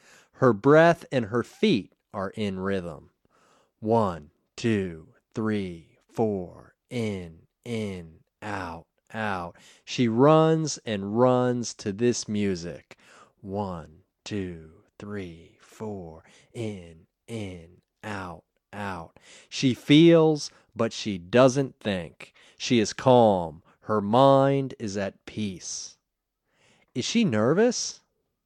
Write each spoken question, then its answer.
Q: Is she nervous?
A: No, she isn't nervous.